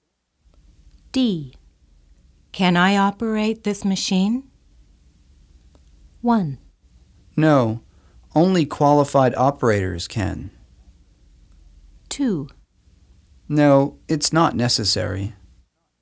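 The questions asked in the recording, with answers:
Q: Can I operate this machine?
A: 1: No, only qualified operators can.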